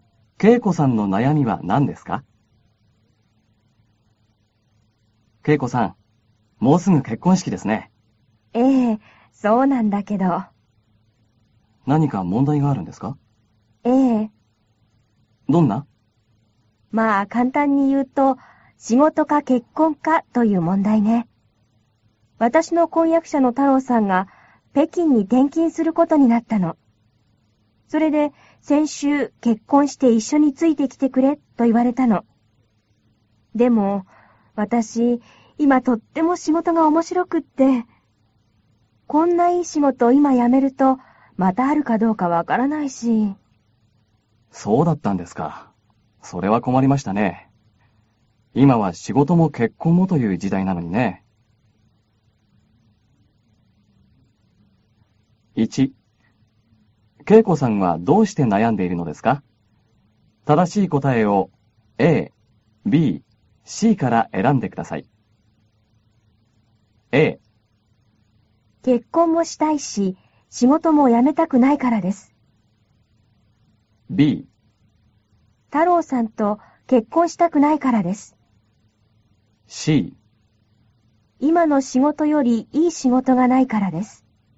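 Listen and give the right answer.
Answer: A: 結婚もしたいし、仕事も辞めたくないからです。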